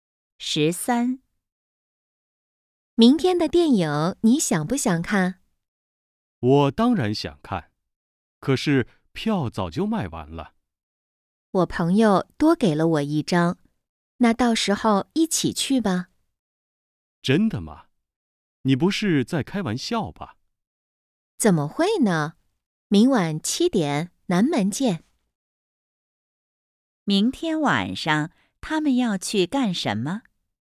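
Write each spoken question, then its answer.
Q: 明天晚上他们要去干什么?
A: 看电影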